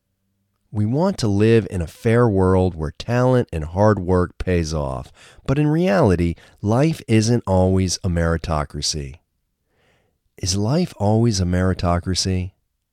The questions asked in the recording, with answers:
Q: Is life always a meritocracy?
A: No, life isn't always a meritocracy.